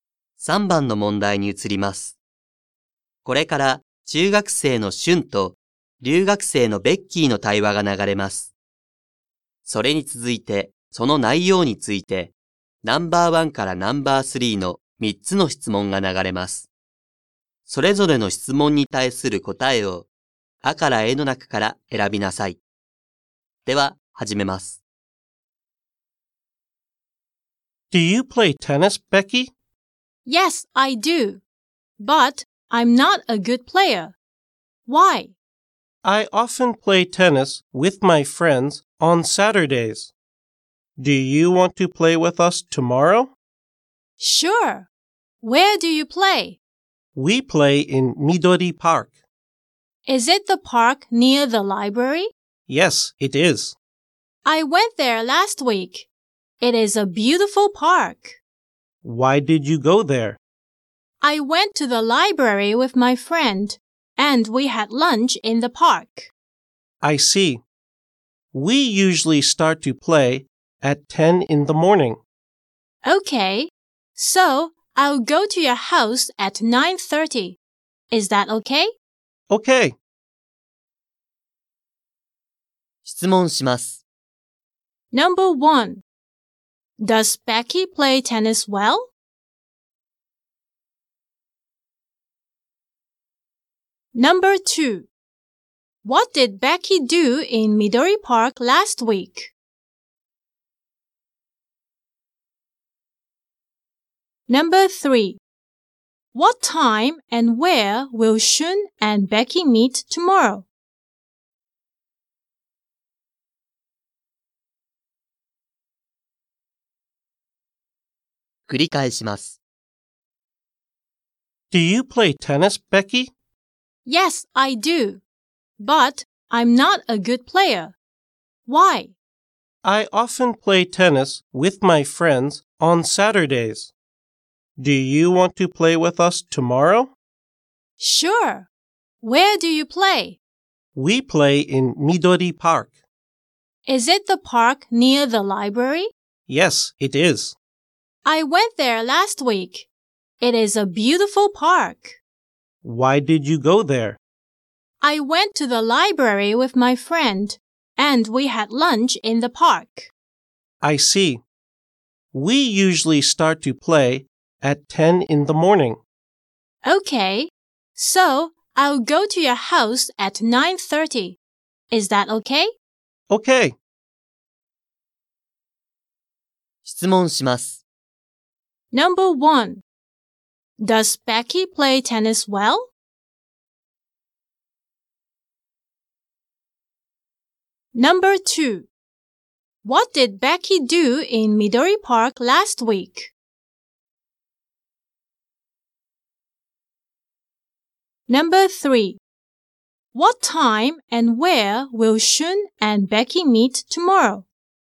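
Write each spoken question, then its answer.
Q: Does Becky play tennis well?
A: No, she doesn't.

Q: What did Becky do in Midori Park last week?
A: She had lunch there with her friend.

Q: What time and where will Shun and Becky meet tomorrow?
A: At 9:30 at Shun's house.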